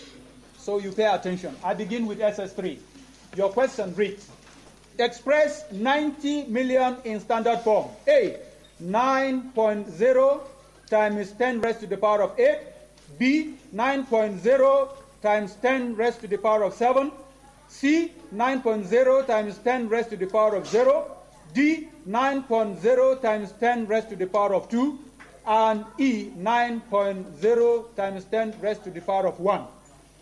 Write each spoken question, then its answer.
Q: express 90 million in standard form.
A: Yes, that is the correct answer.